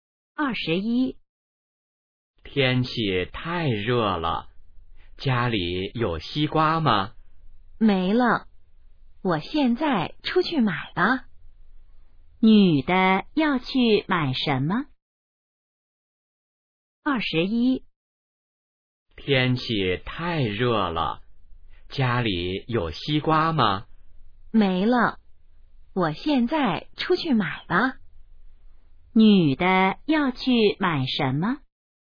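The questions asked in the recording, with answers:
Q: 女的要去买什么?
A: 西瓜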